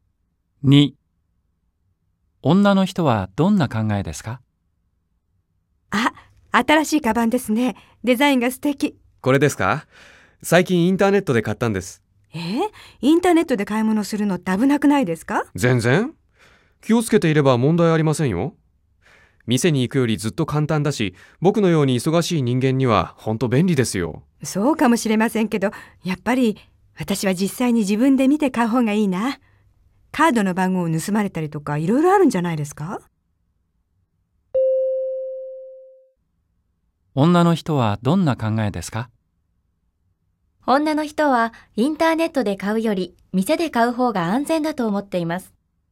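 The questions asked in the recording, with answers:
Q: 女の人はどんな考えですか?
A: ○(店で自分で見て買う方が安全だと思っている)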